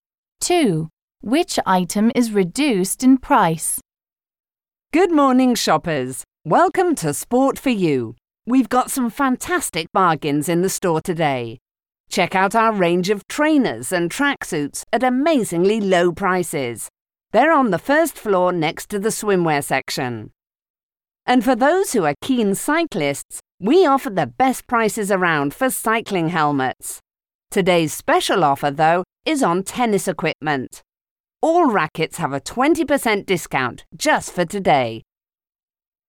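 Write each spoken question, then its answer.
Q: Which item is reduced in price?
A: Tennis rackets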